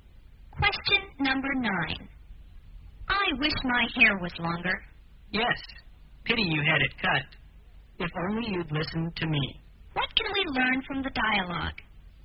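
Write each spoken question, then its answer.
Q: What can we learn from the dialogue?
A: She regrets having her hair cut; the other person had advised her not to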